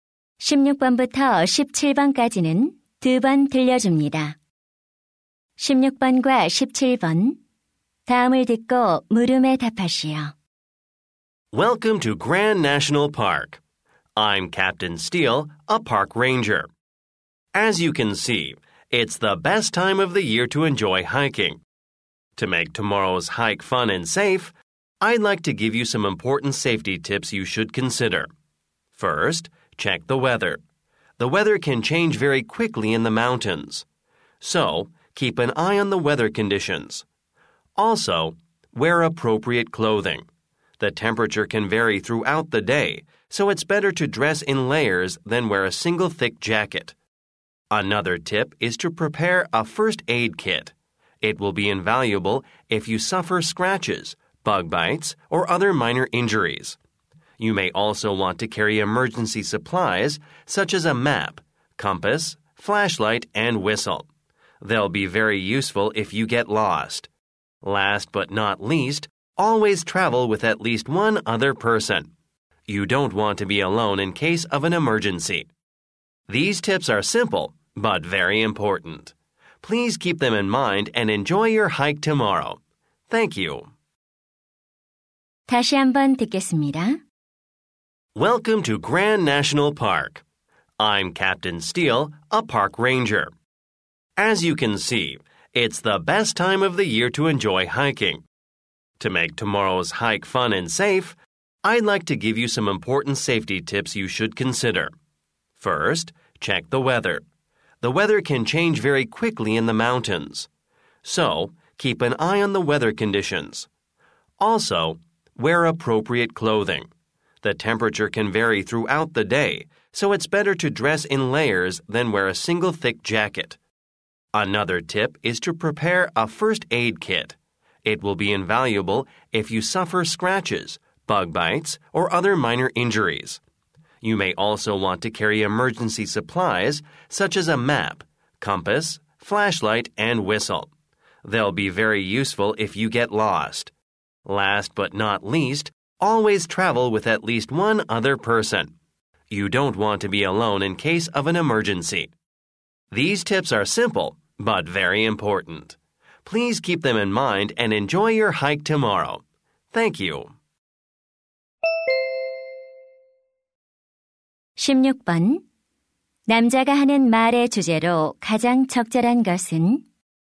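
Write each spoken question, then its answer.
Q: 남자가 하는 말의 주제로 가장 적절한 것은?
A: 안전한 등산을 위한 유의 사항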